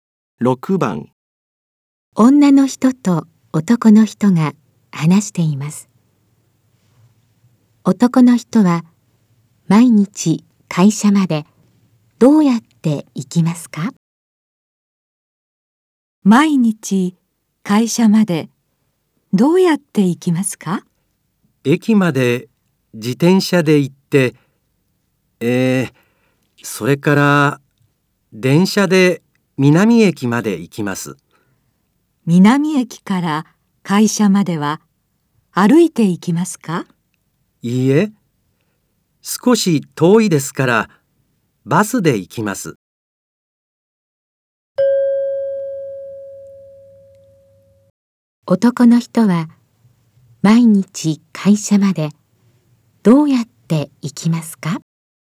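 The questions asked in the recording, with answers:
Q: 男の人は毎日会社までどうやって行きますか?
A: 駅まで自転車、南駅まで電車、それからバスで行きます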